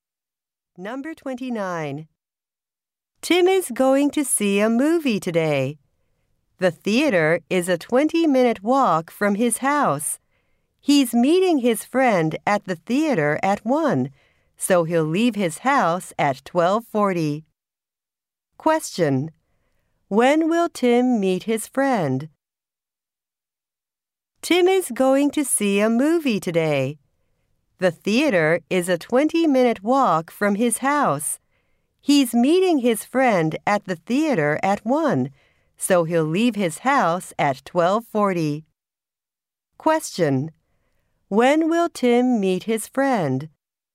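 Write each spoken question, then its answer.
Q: When will Tim meet his friend?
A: At 1 o'clock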